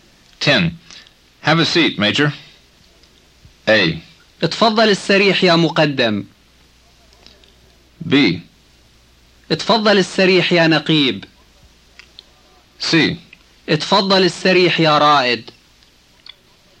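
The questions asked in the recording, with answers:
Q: Have a seat, Major.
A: C: اتفضل السريح يا رائد.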